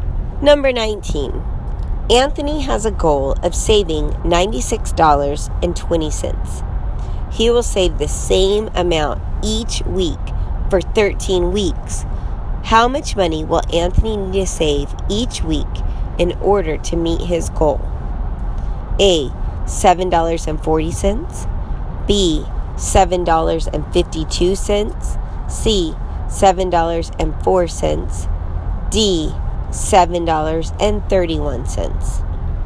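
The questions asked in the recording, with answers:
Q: How much money will Anthony need to save each week in order to meet his goal?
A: A: $7.40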